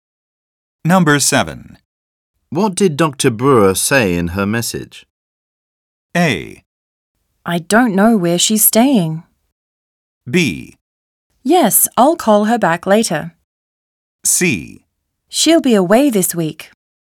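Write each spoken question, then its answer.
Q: What did Dr. Brewer say in her message?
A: C: She'll be away this week.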